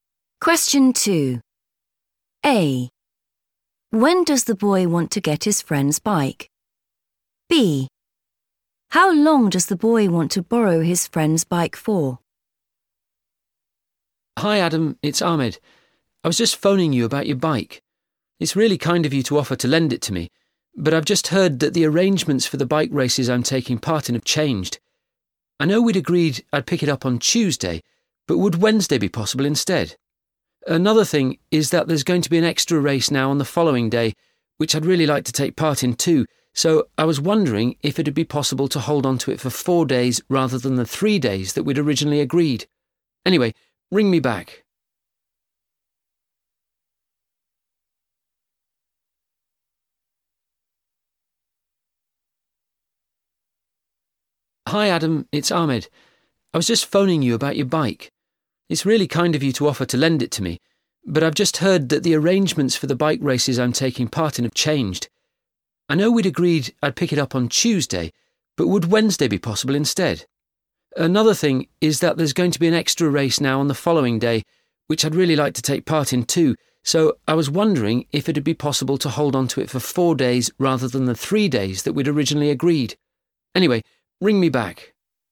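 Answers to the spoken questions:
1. Wednesday
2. 4 days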